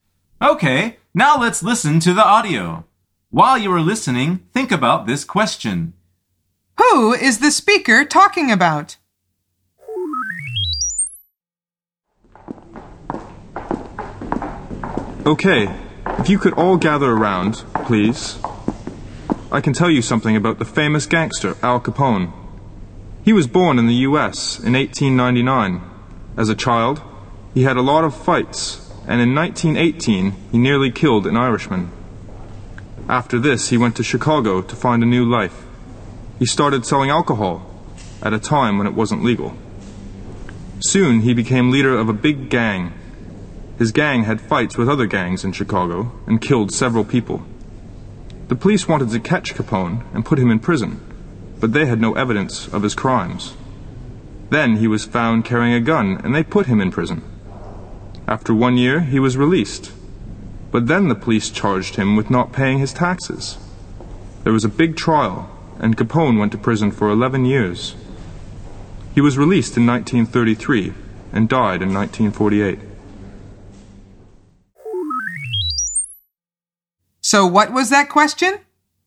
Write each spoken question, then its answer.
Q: Who is the speaker talking about?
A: The answer is he is talking about Al Capone.